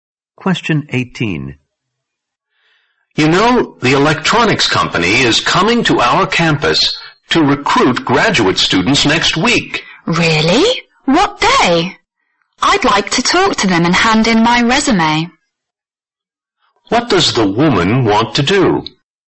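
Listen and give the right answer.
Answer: Talk to the company and hand in her resume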